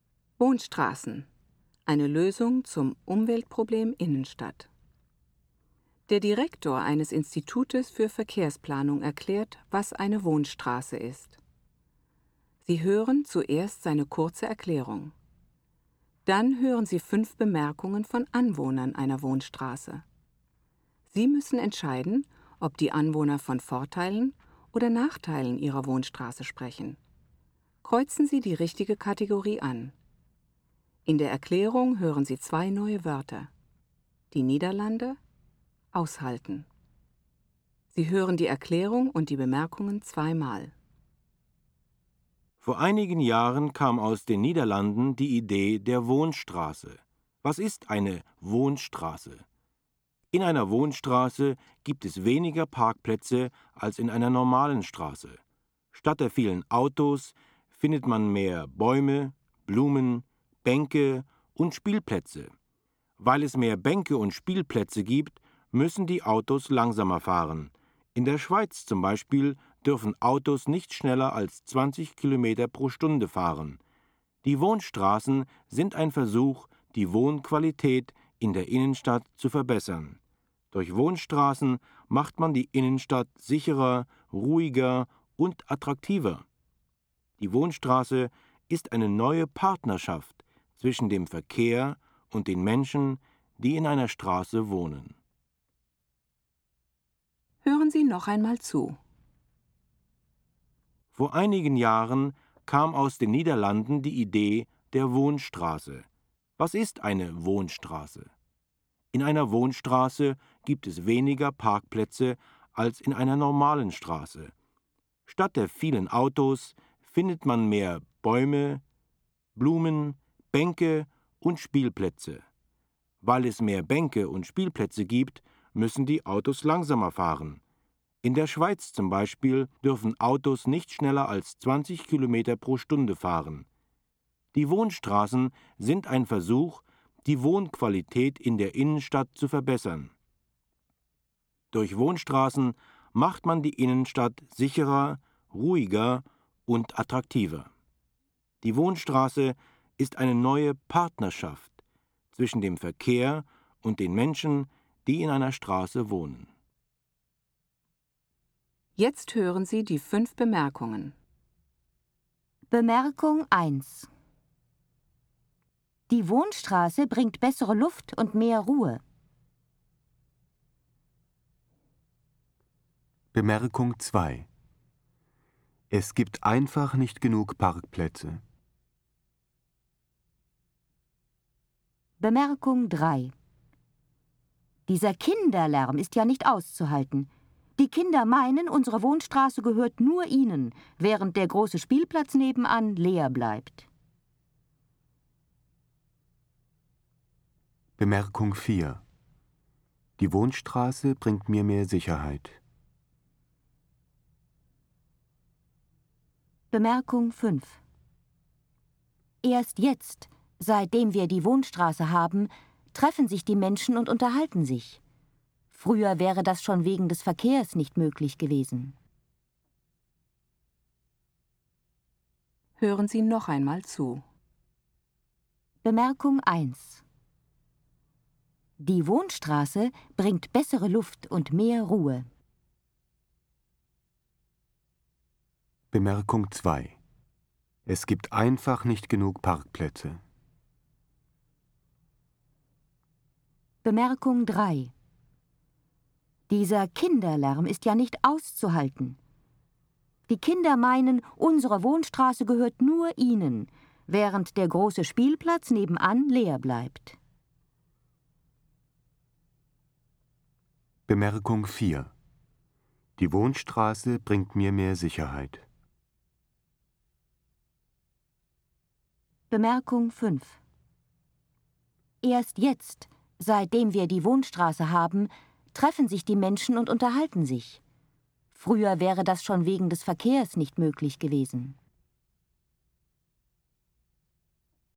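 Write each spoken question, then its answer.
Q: Bemerkung 1. Die Wohnstraße bringt bessere Luft und mehr Ruhe.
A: Vorteil

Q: Bemerkung 2. Es gibt einfach nicht genug Parkplätze.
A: Nachteil

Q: Bemerkung 3. Dieser Kinderlärm ist ja nicht auszuhalten.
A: Nachteil

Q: Bemerkung 4. Die Wohnstraße bringt mir mehr Sicherheit.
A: Vorteil

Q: Bemerkung 5. Erst jetzt, seitdem wir die Wohnstraße haben, treffen sich die Menschen und unterhalten sich.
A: Vorteil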